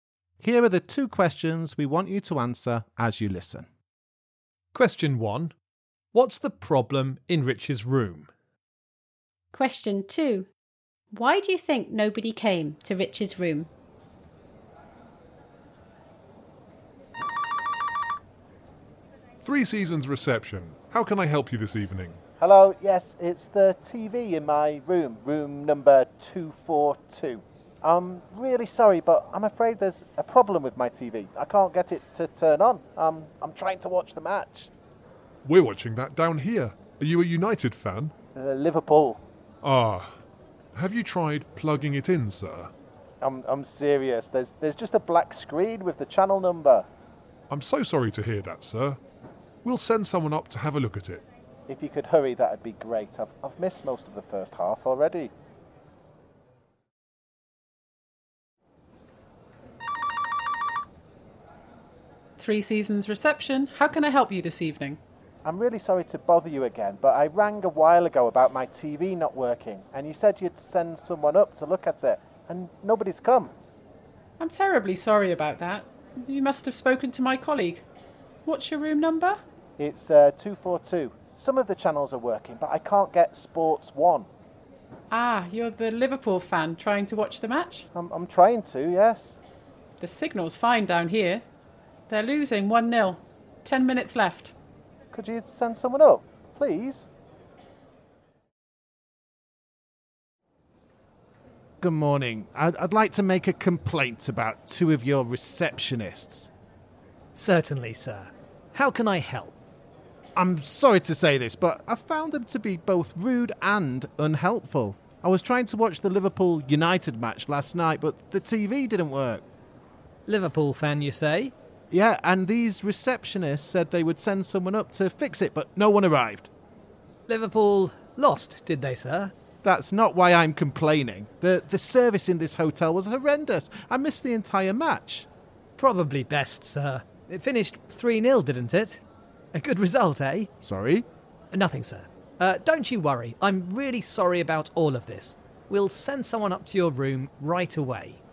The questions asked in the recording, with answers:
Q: What's the problem in Rich's room?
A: The answer is that the TV in my room wasn't working.